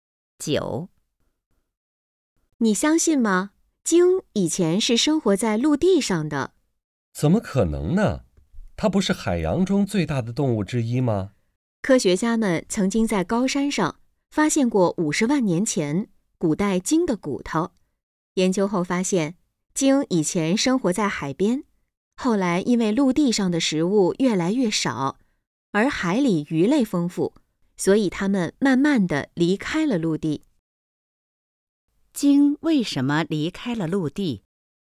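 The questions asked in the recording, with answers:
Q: 鲸为什么离开了陆地?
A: 陆地上的食物越来越少,而海里鱼类丰富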